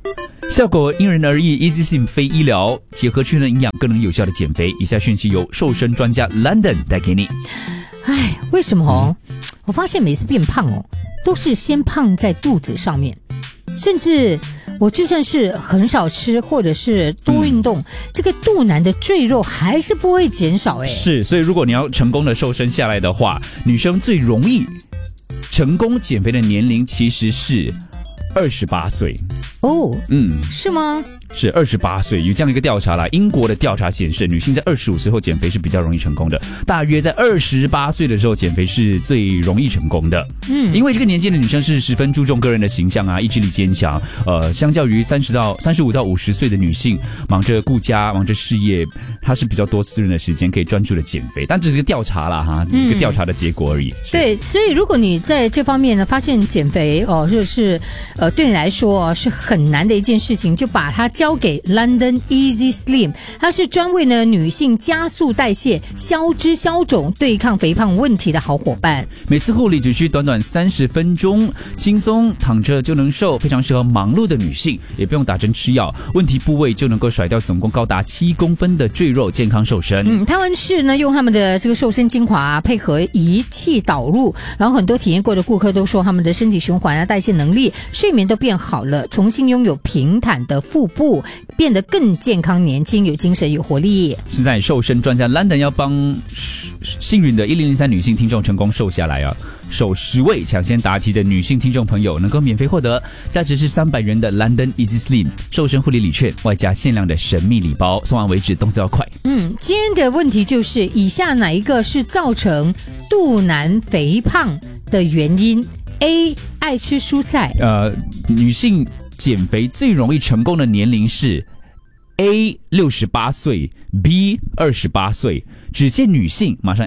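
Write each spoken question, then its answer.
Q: 减肥最容易成功的年龄是 A 68岁 ,B 28岁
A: B: 28岁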